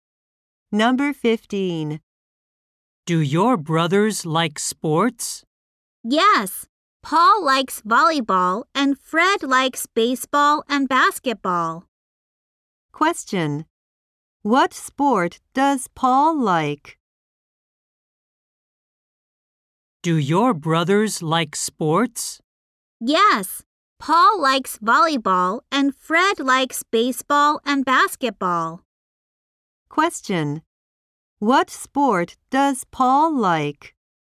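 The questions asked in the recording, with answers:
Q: What sport does Paul like?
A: Volleyball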